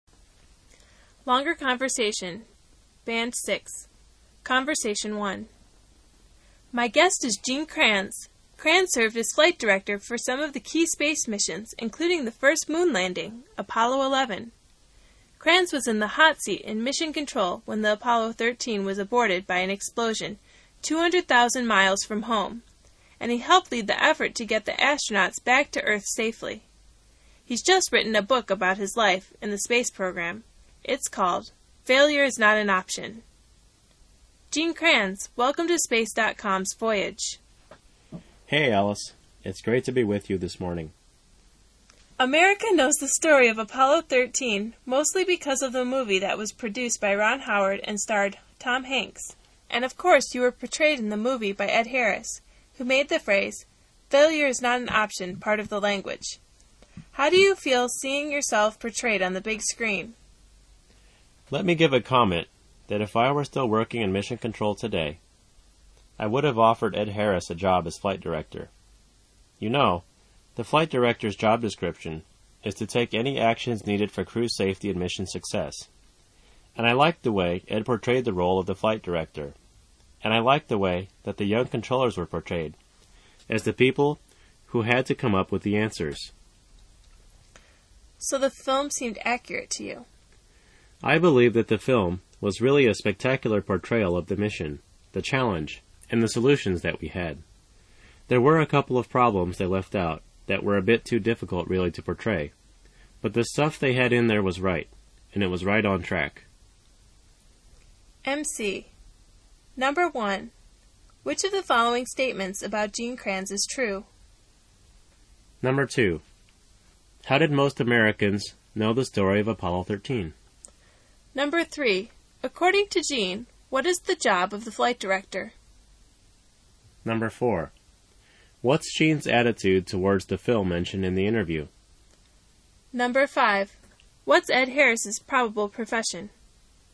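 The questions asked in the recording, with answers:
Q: how did most Americans know the story of Apollo 13?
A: Through the movie produced by Ron Howard starring Tom Hanks

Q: According to Gene, what is the job of the flight director?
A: To take any actions needed for crew safety and mission success

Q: What's Gene's attitude towards the film mentioned in the interview?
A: Very positive; he thinks it was accurate and spectacular

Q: What's Ed Harris's probable profession?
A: An actor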